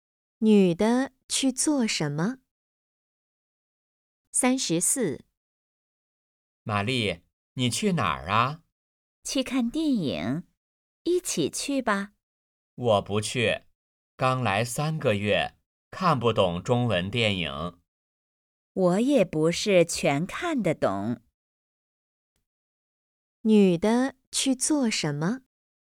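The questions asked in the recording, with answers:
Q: 女的去做什么?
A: 看电影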